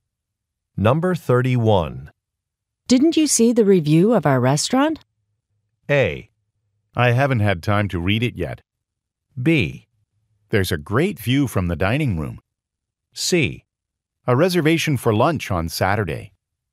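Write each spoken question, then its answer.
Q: Didn't you see the review of our restaurant?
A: A: I haven't had time to read it yet.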